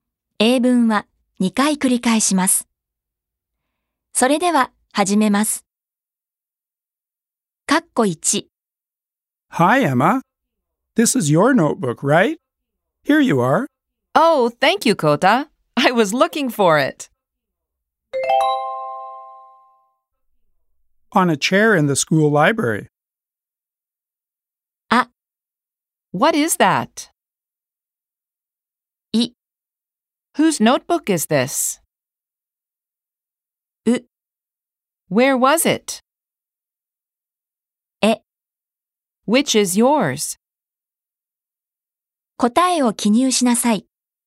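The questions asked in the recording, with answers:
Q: Oh, thank you, Kota. I was looking for it.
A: う: Where was it?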